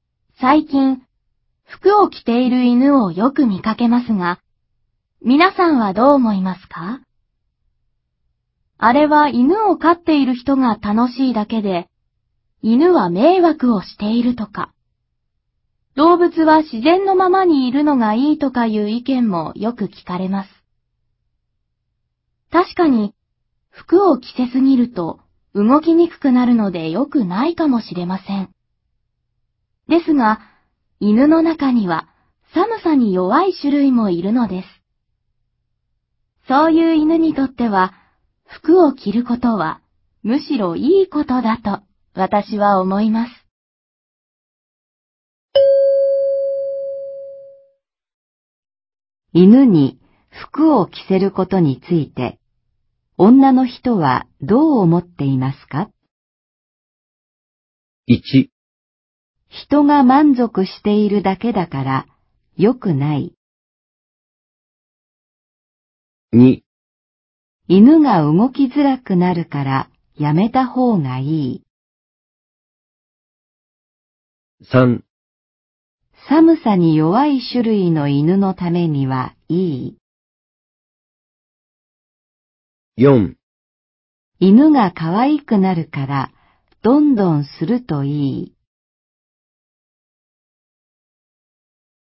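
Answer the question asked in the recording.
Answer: 3: 寒さに弱い種類の犬のためにはいい。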